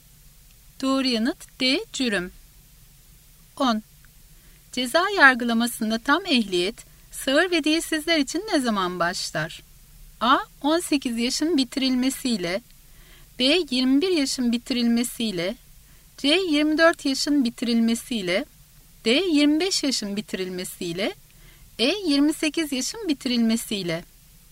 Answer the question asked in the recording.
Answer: Doğru yanıt C. 24 yaşın bitirilmesiyle.